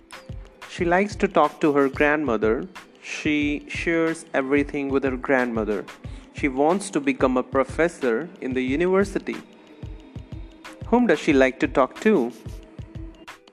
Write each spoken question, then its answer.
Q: Whom does she like to talk to?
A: She likes to talk to her grandmother.